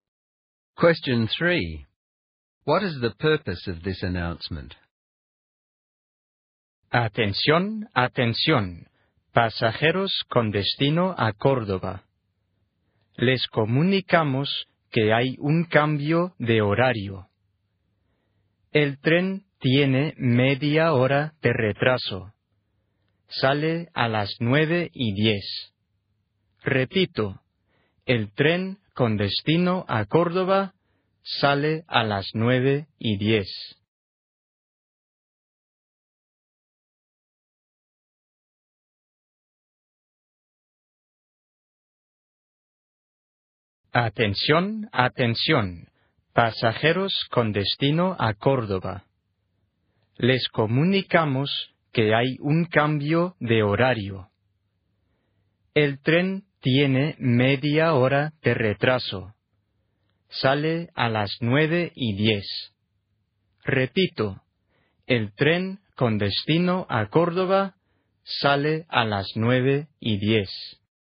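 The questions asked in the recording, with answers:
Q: What is the purpose of this announcement?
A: To tell passengers to Córdoba that the timetable has changed: the train is half an hour late and leaves at 9:10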